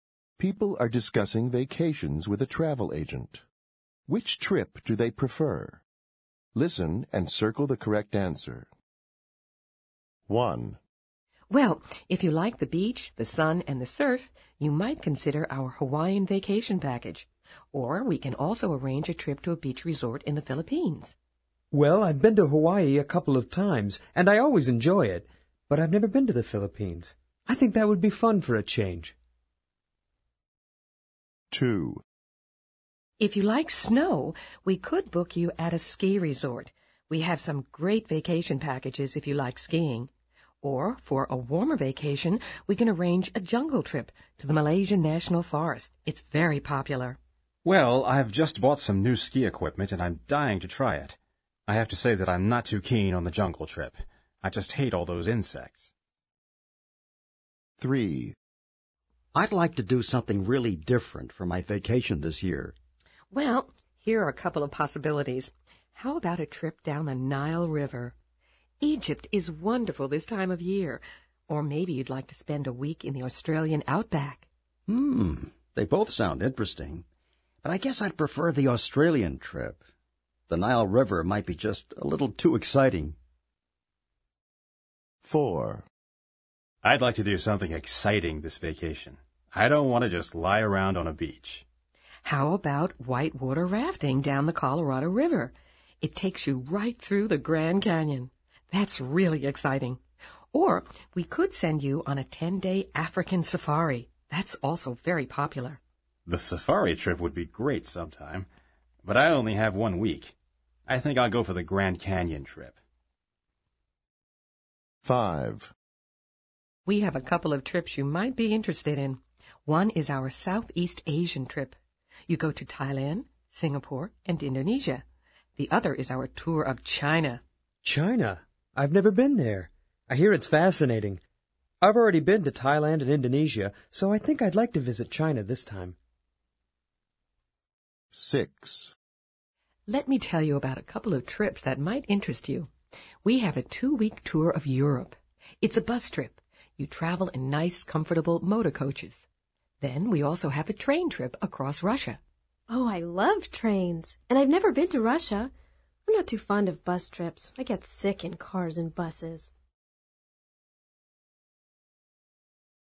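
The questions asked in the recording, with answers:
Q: Which trip do they prefer?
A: The beach resort in the Philippines

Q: Which trip do they prefer?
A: The ski resort

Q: Which trip do they prefer?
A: The Australian outback trip

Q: Which trip do they prefer?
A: Whitewater rafting through the Grand Canyon

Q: Which trip do they prefer?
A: The tour of China

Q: Which trip do they prefer?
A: The train trip across Russia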